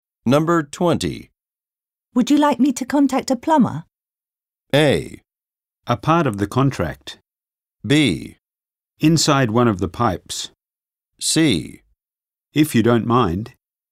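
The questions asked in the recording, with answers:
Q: Would you like me to contact a plumber?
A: C: If you don't mind.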